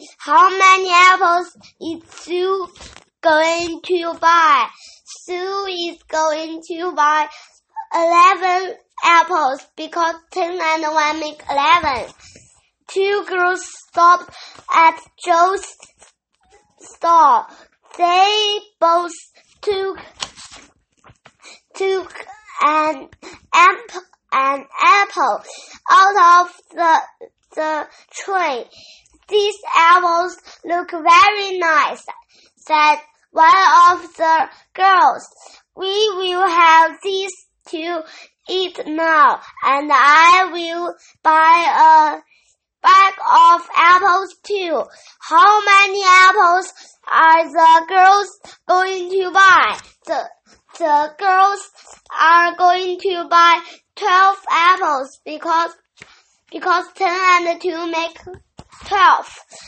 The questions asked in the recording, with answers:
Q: How many apples are the girls going to buy?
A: The girls are going to buy 12 apples because 10 and 2 make 12.